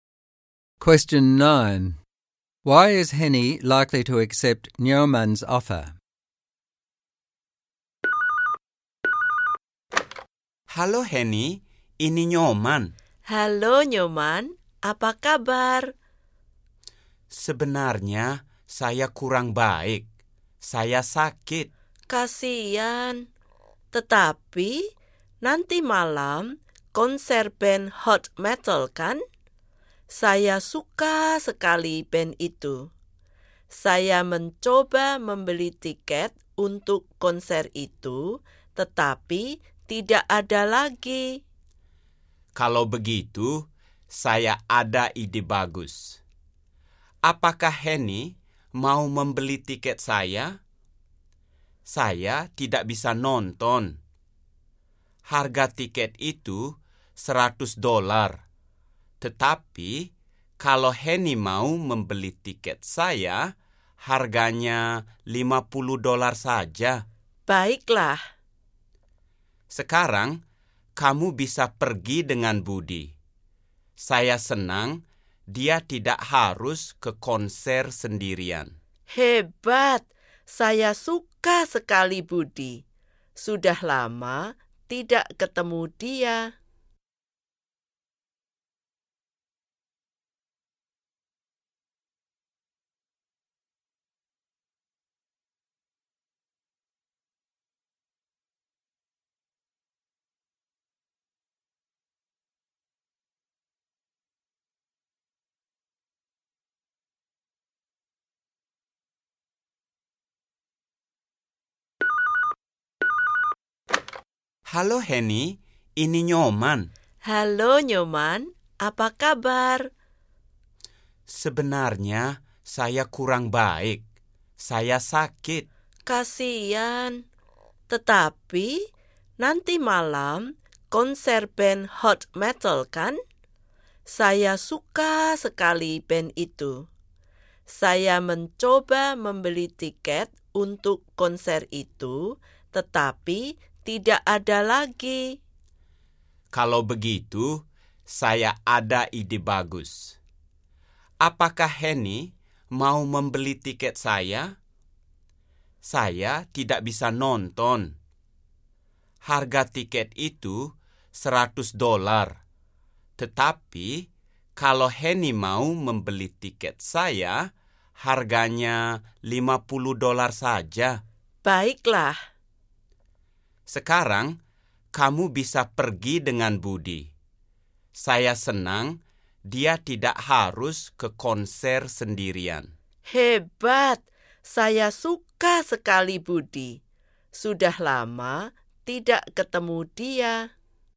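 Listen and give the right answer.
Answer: She loves the band, tickets are sold out, she gets it half price ($50), and she can go with Budi, whom she likes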